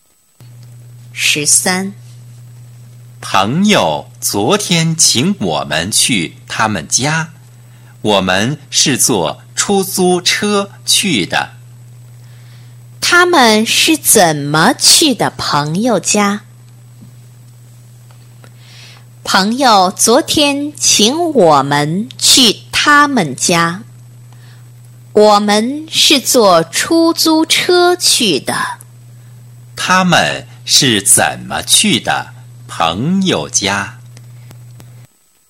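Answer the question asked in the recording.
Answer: 坐出租车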